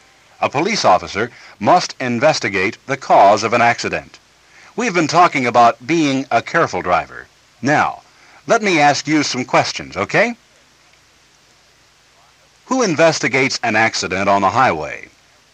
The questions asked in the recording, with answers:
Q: Who investigates an accident on the highway?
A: A police officer.